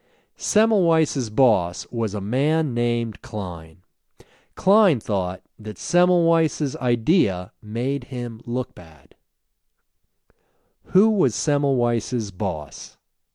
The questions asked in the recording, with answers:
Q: Who was Semmelweis's boss?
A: Semmelweis's boss was a man named Klein.